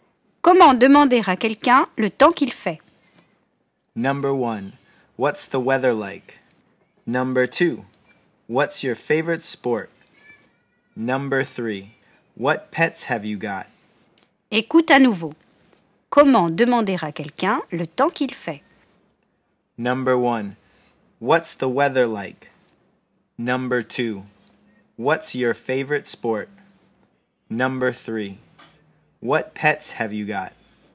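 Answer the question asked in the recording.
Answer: 1: What's the weather like?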